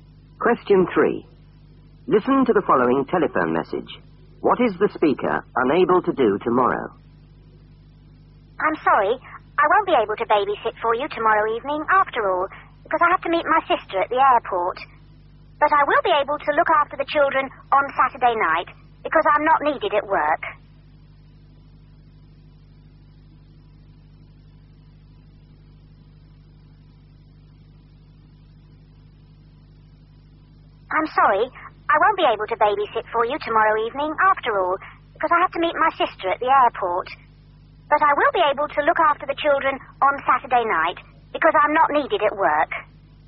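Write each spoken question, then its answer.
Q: What is the speaker unable to do tomorrow?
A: Babysit tomorrow evening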